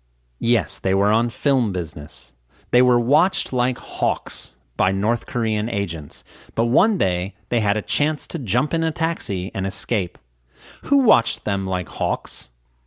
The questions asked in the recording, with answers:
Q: Who watched them like hawks?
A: North Korean agents watched them like hawks.